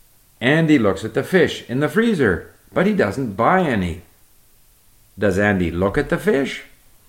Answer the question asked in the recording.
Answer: Yes, Andy looks at the fish in the freezer, but he doesn't buy any.